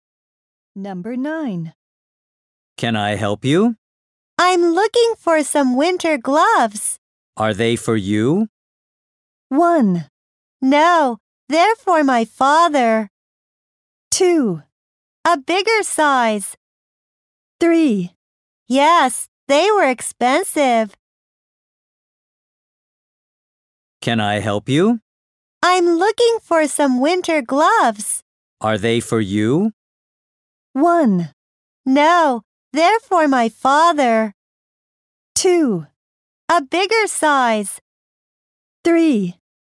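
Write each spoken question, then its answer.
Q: Are they for you?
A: 1: No, they're for my father.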